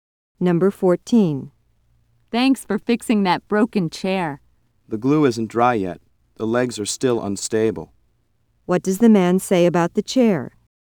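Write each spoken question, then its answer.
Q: What does the man say about the chair?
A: It shouldn't be used yet because the glue isn't dry.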